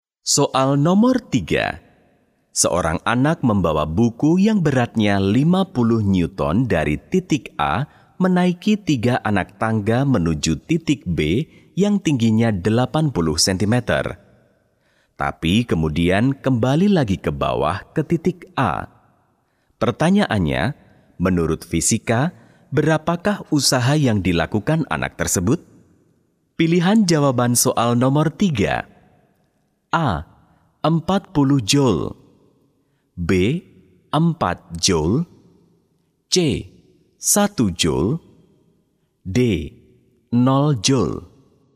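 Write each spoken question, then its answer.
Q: Pertanyaannya, menurut fisika, berapakah usaha yang dilakukan anak tersebut?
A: D: 0 joule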